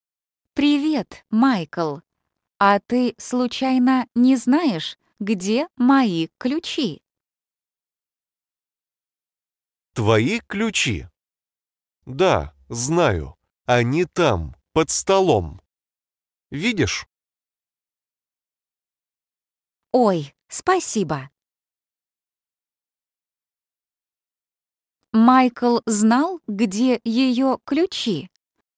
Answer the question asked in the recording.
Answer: Да, он знал.